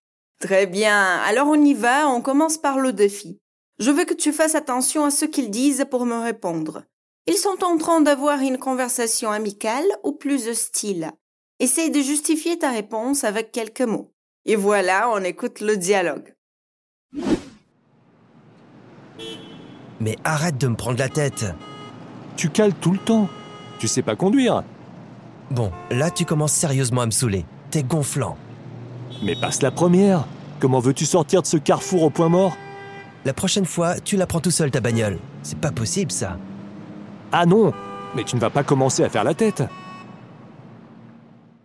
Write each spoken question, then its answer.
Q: Ils sont en train d'avoir une conversation amicale ou plus hostile.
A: Et cette phrase nous montre déjà que ce dialogue va être plus hostile.